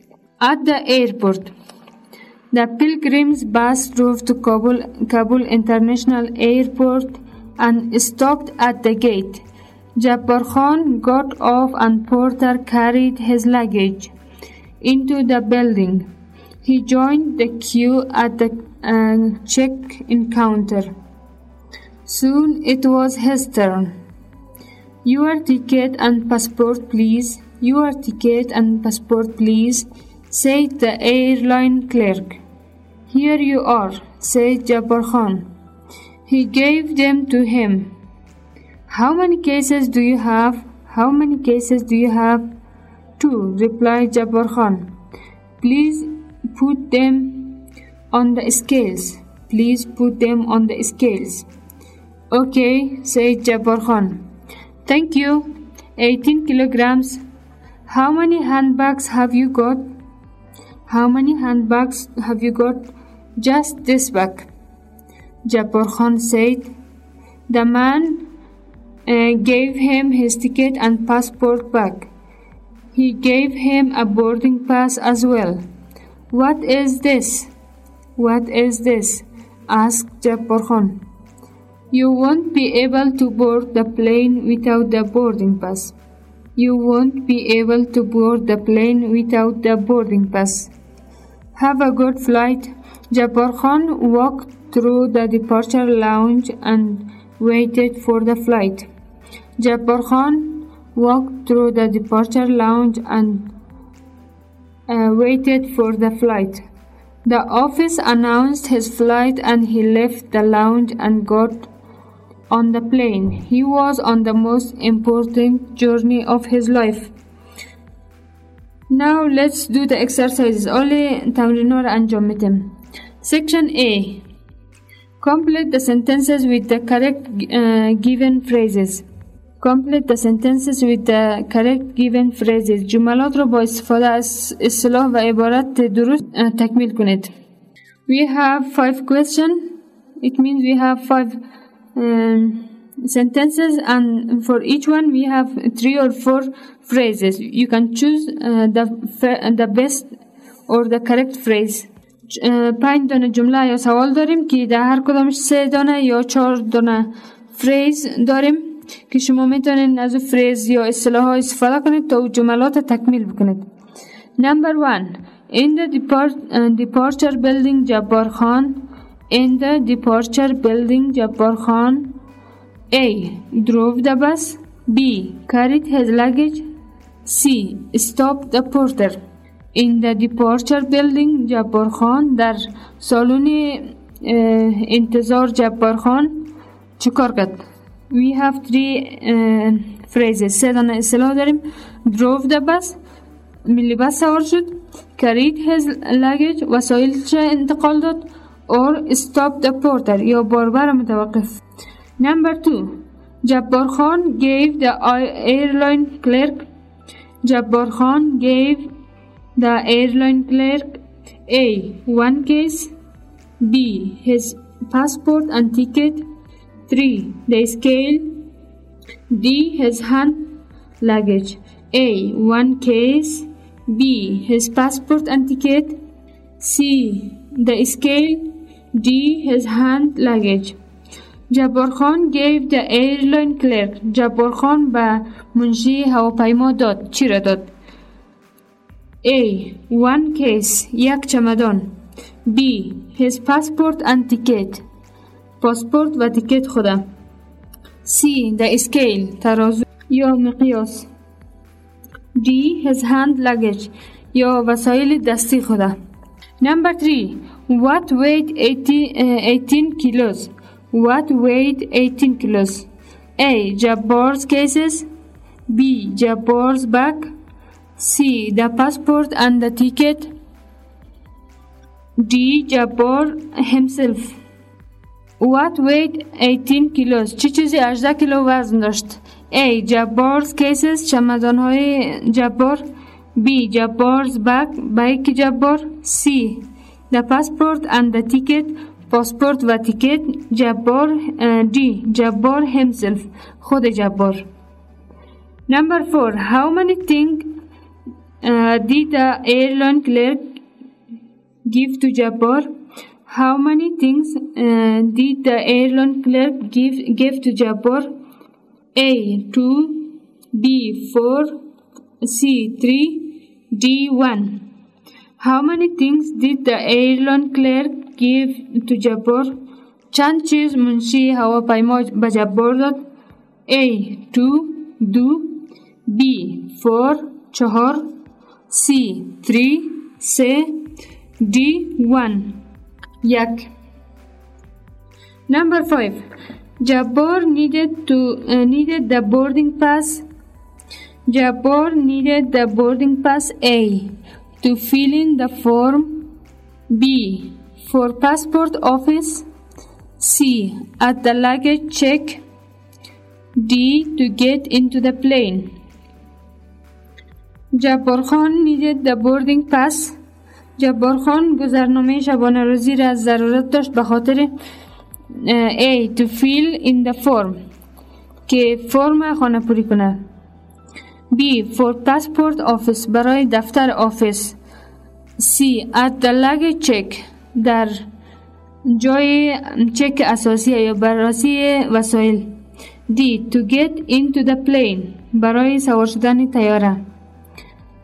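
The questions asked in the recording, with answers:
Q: جبار خان gave the airline clerk A.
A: B: His passport and ticket

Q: What weighed 18 kilos?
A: A: Jabbar's cases

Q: How many things did the airline clerk give to Jabbar?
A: C: 3

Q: Jabbar needed the boarding pass A.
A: D: To get into the plane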